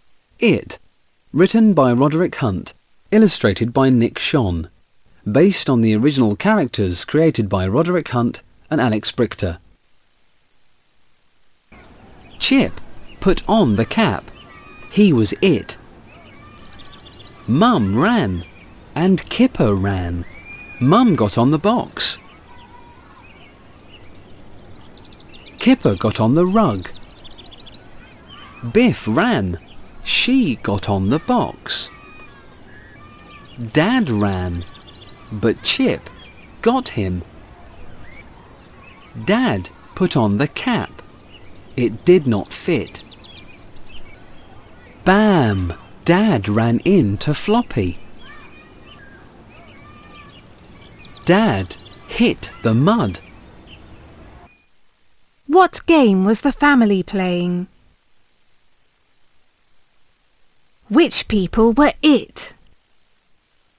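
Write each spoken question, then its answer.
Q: Which people were it?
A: Chip and Dad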